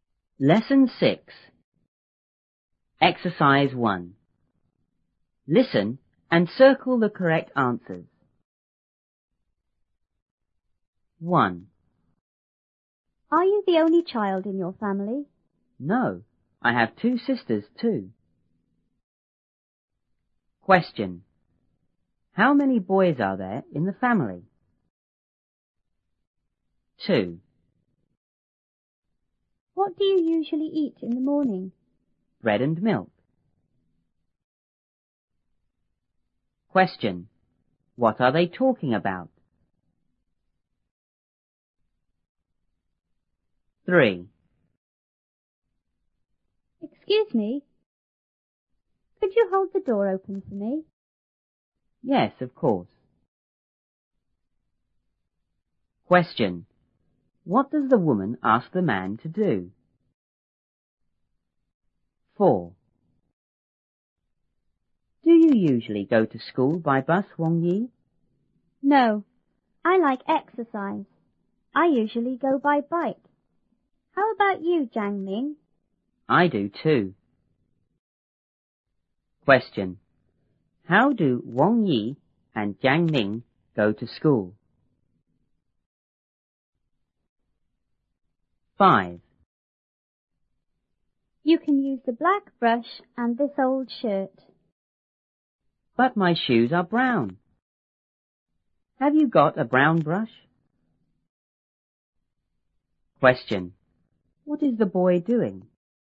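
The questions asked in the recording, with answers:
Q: What are they talking about?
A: Breakfast

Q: What does the woman ask the man to do?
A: Hold the door open for her

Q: How do Wang Yi and Jiang Ming go to school?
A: By bike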